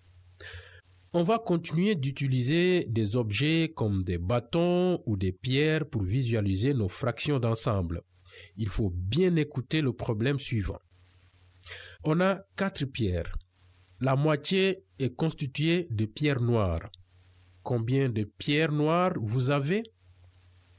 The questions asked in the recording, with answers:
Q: Combien de pierres noires vous avez?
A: C'est ça. On a 2 pierres noires.